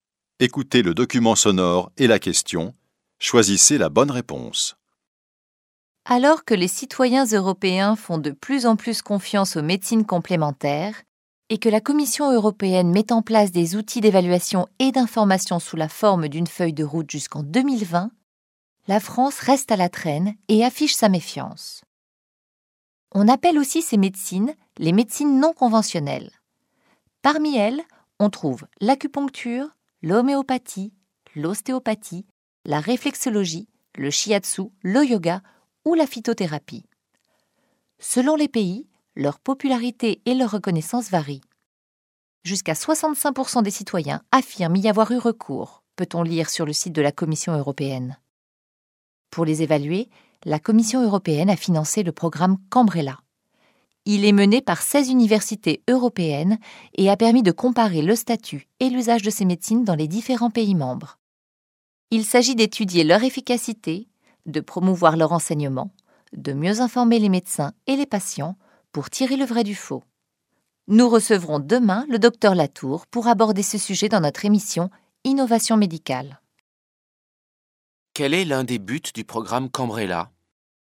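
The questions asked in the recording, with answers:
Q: Quel est l'un des buts du programme Cambrella ?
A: Étudier l'efficacité des médecines complémentaires (et mieux informer médecins et patients)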